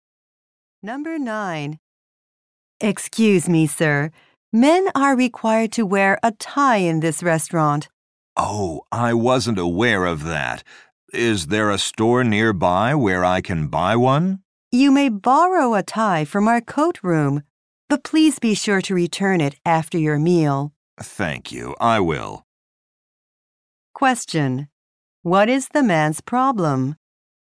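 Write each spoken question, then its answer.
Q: What is the man's problem?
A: He is not wearing a tie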